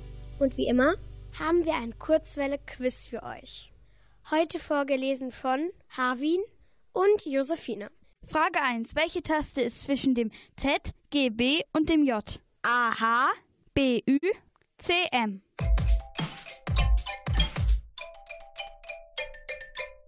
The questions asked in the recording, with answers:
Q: Welche Taste ist zwischen dem Z, G, B und dem J?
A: Und die Antwort ist natürlich das H.